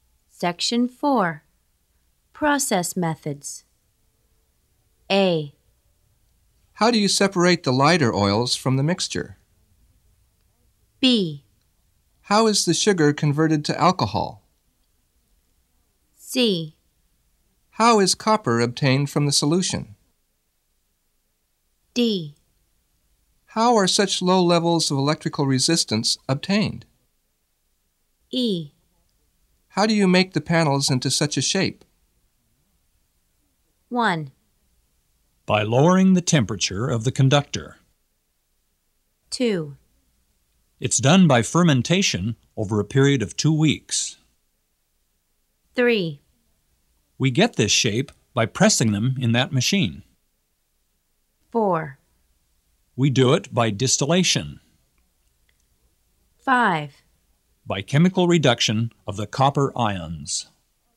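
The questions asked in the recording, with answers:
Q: By lowering the temperature of the conductor.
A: D: How are such low levels of electrical resistance obtained?

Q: It's done by fermentation over a period of 2 weeks.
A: B: How is the sugar converted to alcohol?

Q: We get this shape by pressing them in that machine.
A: E: How do you make the panels into such a shape?

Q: We do it by distillation.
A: A: How do you separate the lighter oils from the mixture?

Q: By chemical reduction of the copper ions.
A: C: How is copper obtained from the solution?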